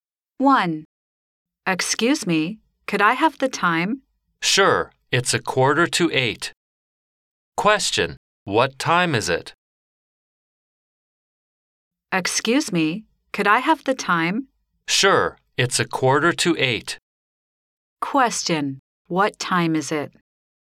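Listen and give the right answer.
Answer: 7:45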